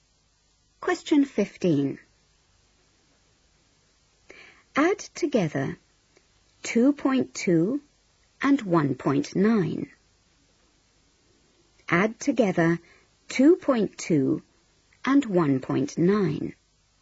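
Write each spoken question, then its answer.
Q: Add together 2.2 and 1.9.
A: 4.1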